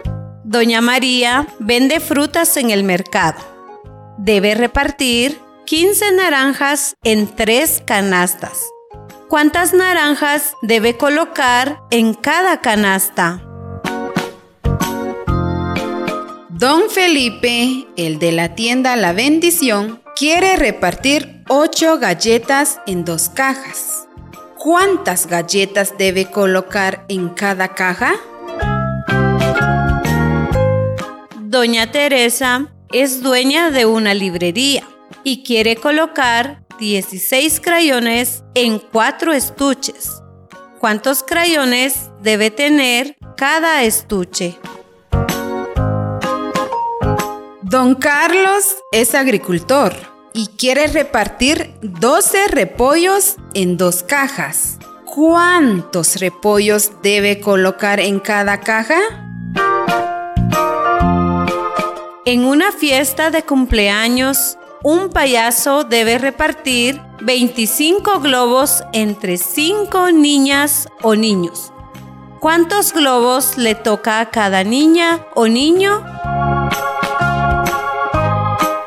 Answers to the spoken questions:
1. 5 naranjas en cada canasta.
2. Cuatro galletas en cada caja.
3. Cuatro crayones en cada estuche.
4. 6 repollos colocó don Carlos en cada caja.
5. Cinco globos para cada niña o niño.